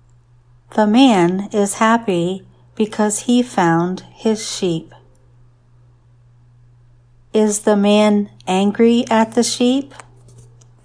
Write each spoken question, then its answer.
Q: Is the man angry at the sheep?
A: No, the man is happy to find the sheep.